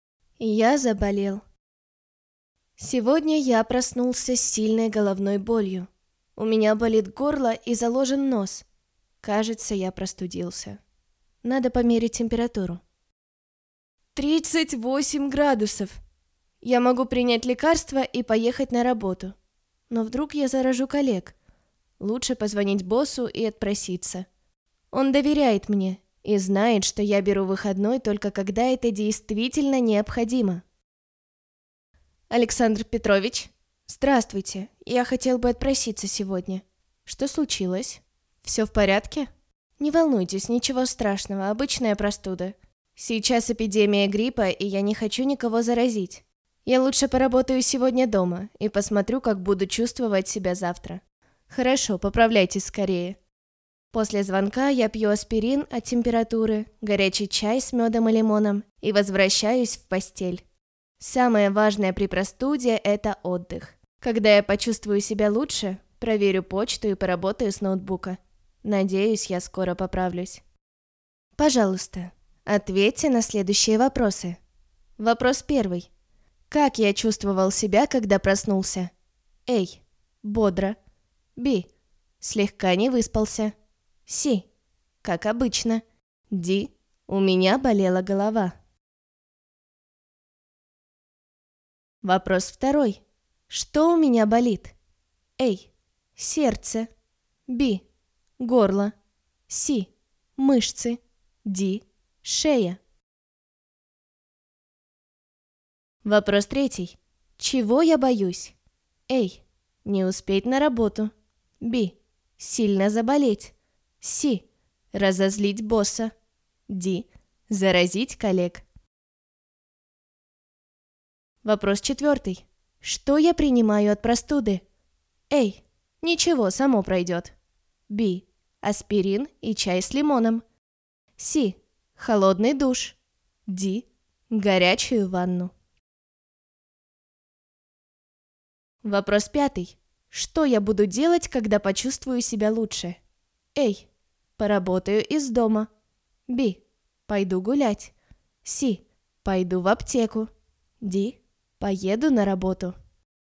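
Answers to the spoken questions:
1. D: У меня болела голова.
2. B: Горло.
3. D: Заразить коллег.
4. B: Аспирин и чай с лимоном.
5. A: Поработаю из дома.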